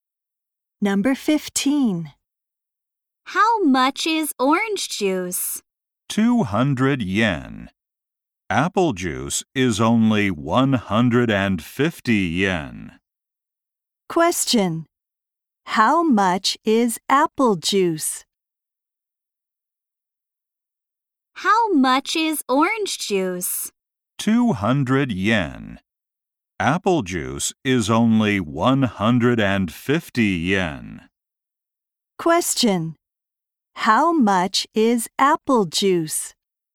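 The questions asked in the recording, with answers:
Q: How much is apple juice?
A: 150 yen.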